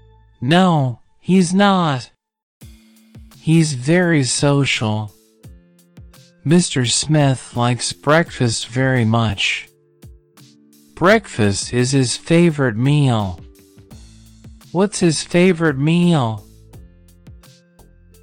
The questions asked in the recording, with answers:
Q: What's his favorite meal?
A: Breakfast.